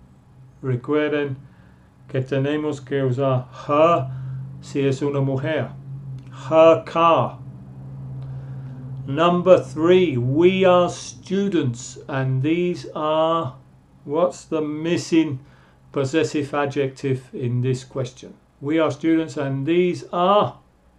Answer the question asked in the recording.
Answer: we are students, and these are our books.